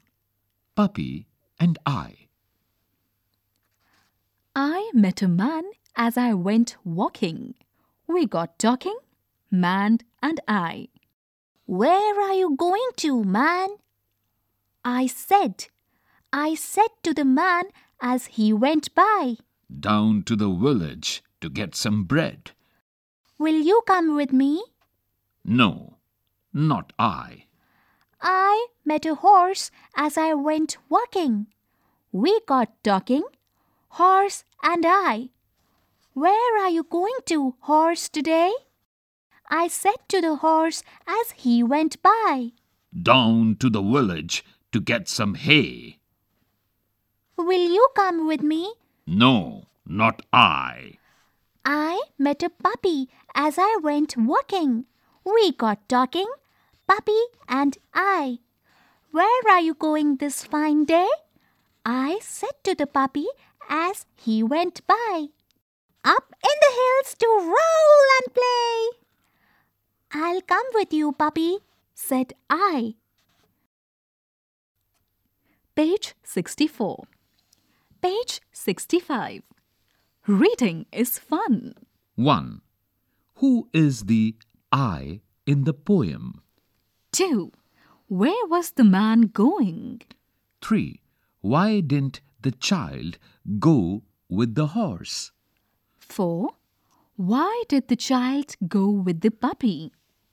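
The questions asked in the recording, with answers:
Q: Where was the man going?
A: Down to the village to get some bread

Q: Why did the child go with the puppy?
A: The puppy was going up in the hills to roll and play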